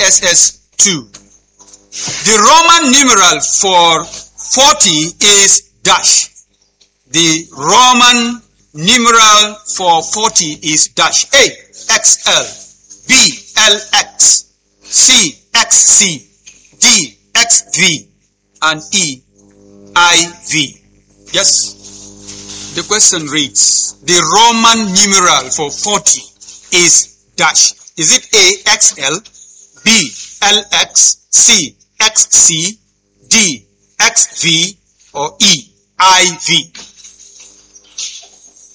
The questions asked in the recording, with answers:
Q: The Roman numeral for 40 is dash.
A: Letter A is XL.